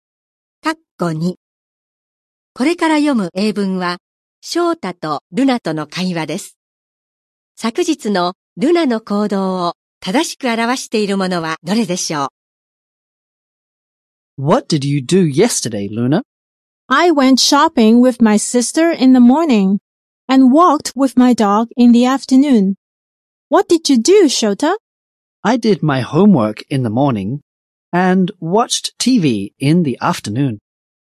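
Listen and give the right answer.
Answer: 午前中に姉(妹)と買い物に行き、午後に犬の散歩をした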